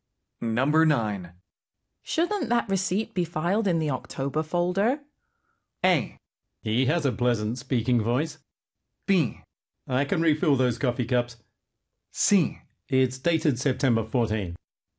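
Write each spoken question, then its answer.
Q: Shouldn't that receipt be filed in the October folder?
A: C: It's dated September 14.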